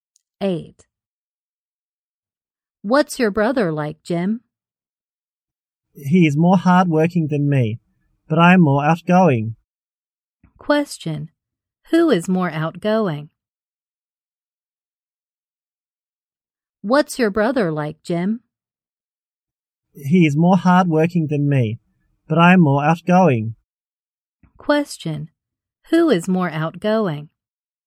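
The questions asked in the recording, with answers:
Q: Who is more outgoing?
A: Jim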